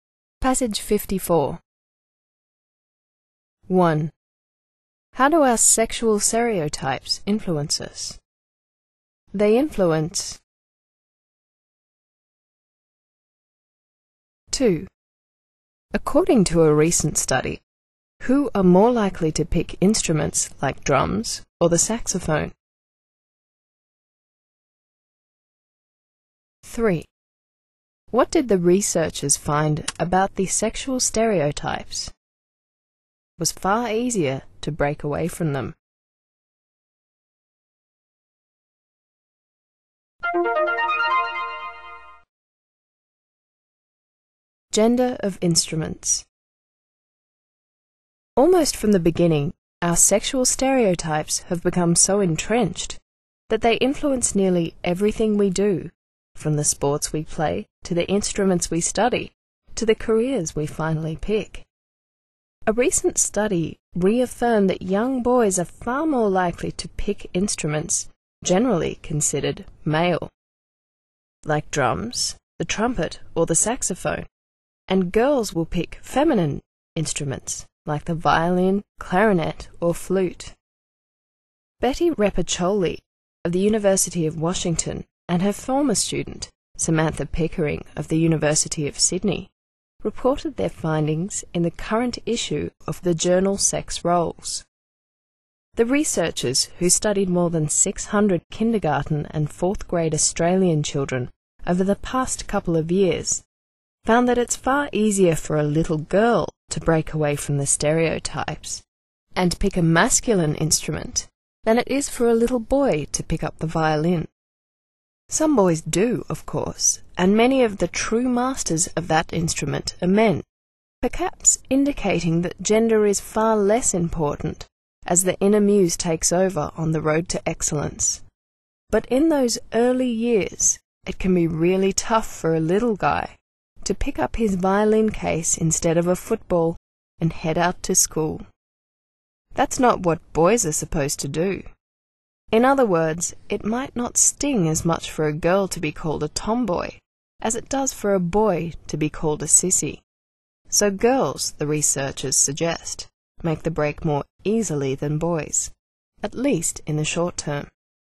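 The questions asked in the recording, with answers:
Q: How do our sexual stereotypes influence us?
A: They influence nearly everything we do, from sports to instruments to careers.

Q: According to a recent study, who are more likely to pick instruments like drums or the saxophone?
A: Young boys

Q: What did the researchers find about the sexual stereotypes?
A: It is far easier for girls to break away from them than for boys.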